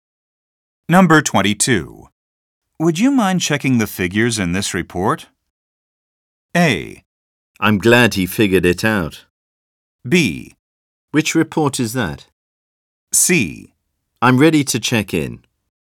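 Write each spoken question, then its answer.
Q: Would you mind checking the figures in this report?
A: B: Which report is that?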